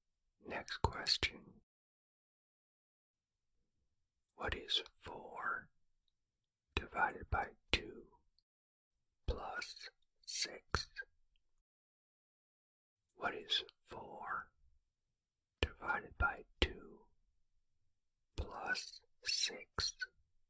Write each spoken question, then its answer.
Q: What is 4 divided by 2 plus 6?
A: The answer is 8.